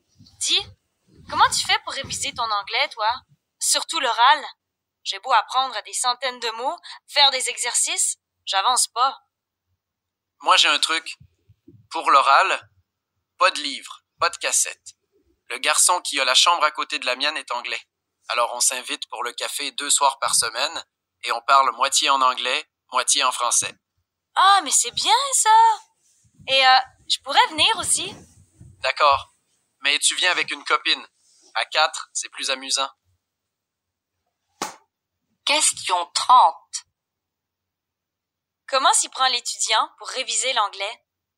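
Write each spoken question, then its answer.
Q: Comment s'y prend l'étudiant pour réviser l'anglais?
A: Il parle avec son voisin de chambre anglais autour d'un café deux soirs par semaine, moitié en anglais, moitié en français.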